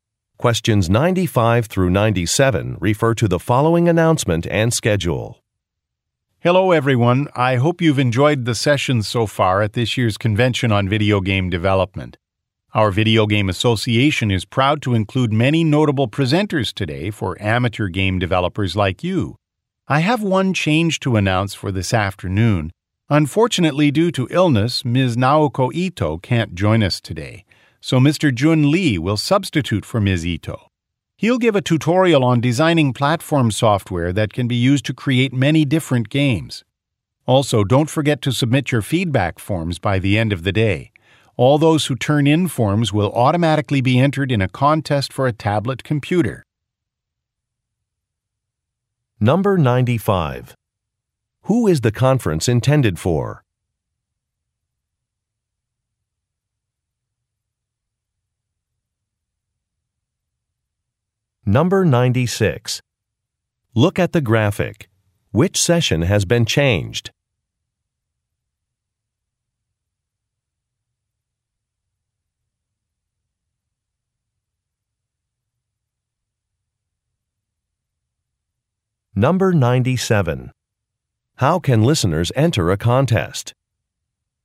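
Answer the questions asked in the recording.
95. Amateur game developers
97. By submitting a feedback form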